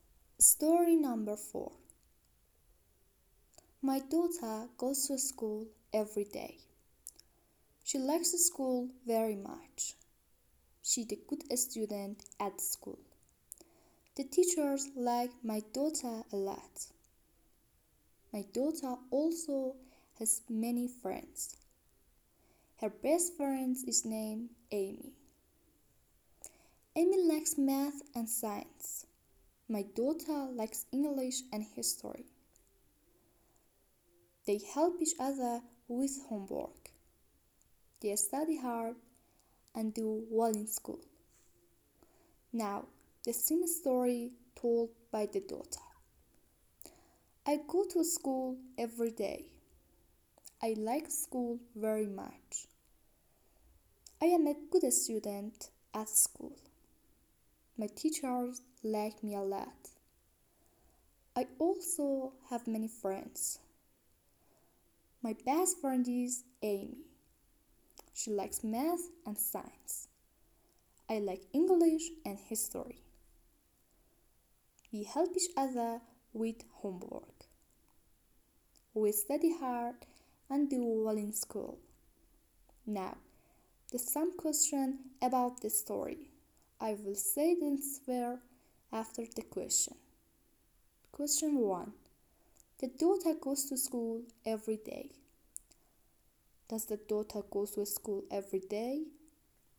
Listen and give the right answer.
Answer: Yes, she goes to school every day.